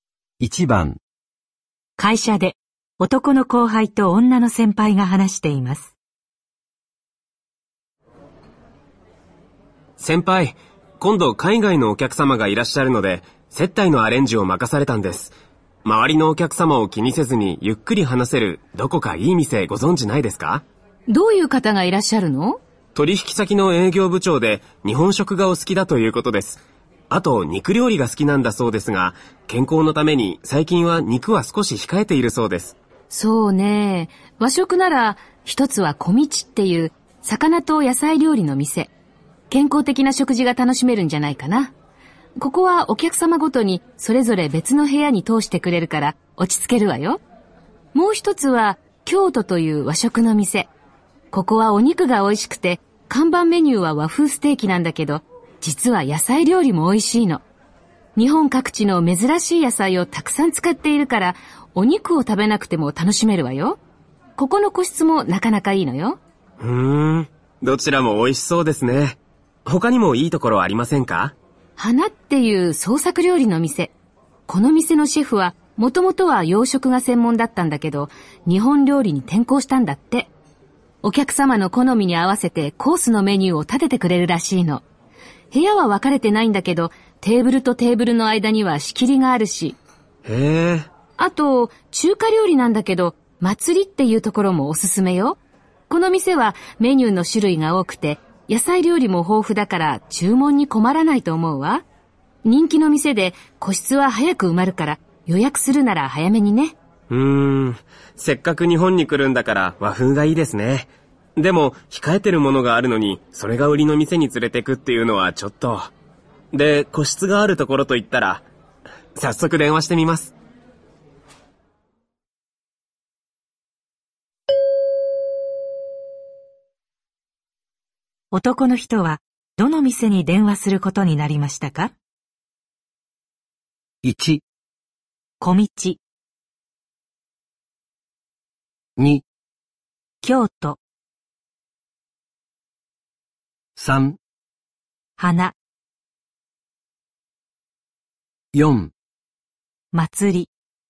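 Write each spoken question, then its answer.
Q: 男の人はどの店に電話することになりましたか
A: 1: 小道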